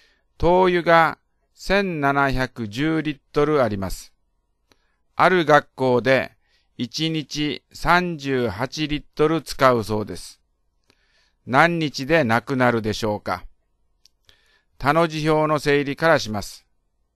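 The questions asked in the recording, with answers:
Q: 何日でなくなるでしょうか。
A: 45日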